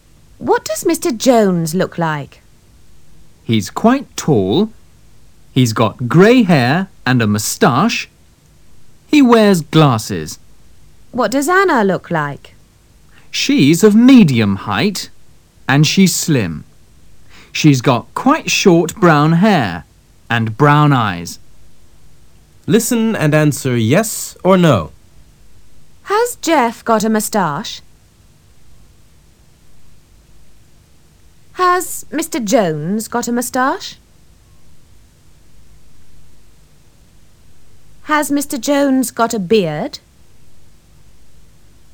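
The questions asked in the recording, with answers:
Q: Has Mr. Jones got a moustache?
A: Yes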